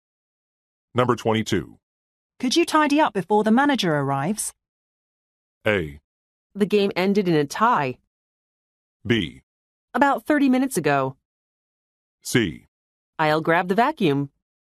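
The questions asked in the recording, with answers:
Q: Could you tidy up before the manager arrives?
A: C: I'll grab the vacuum.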